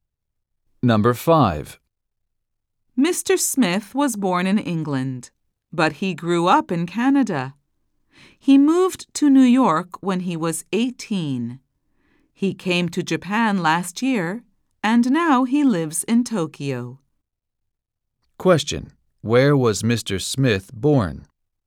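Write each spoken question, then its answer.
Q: Where was Mr. Smith born?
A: In England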